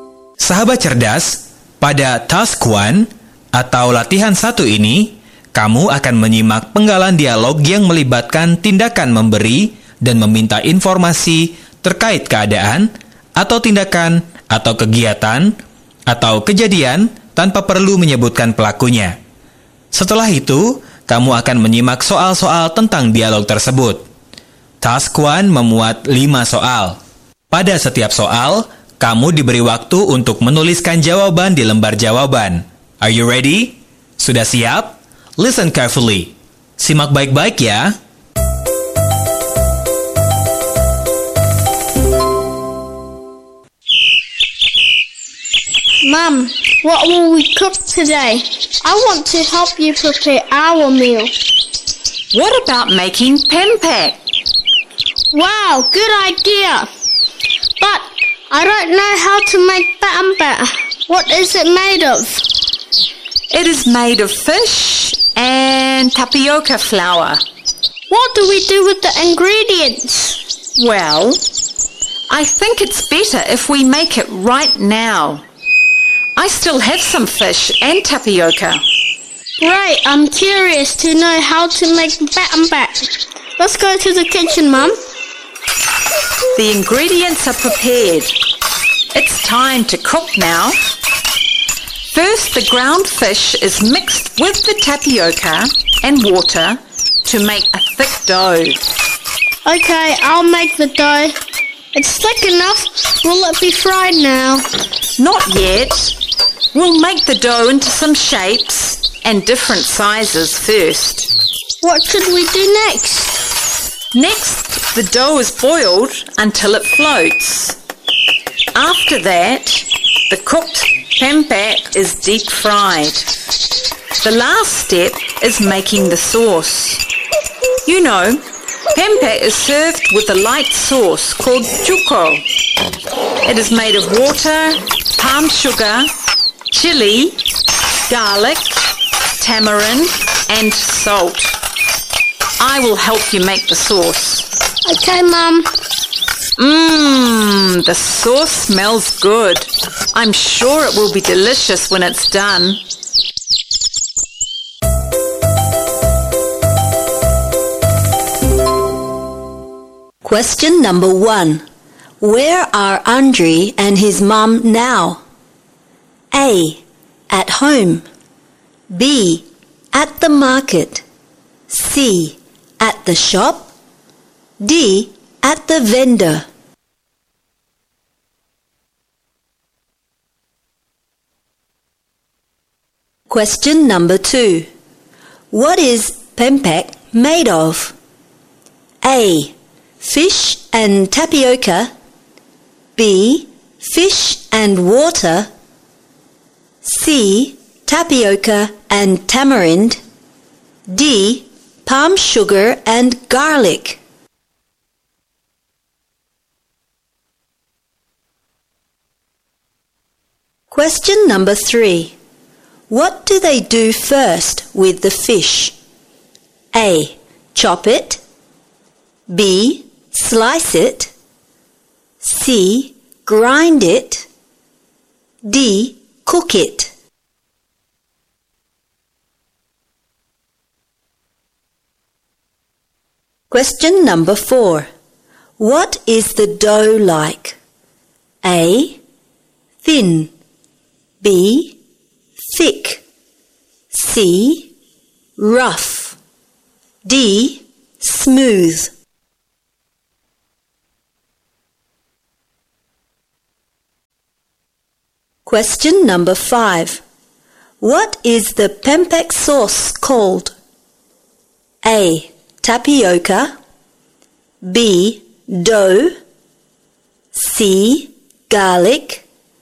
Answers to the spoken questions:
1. A. At home.
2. A. Fish and tapioca.
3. C. Grind it.
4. B. Thick.
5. D. Cuko.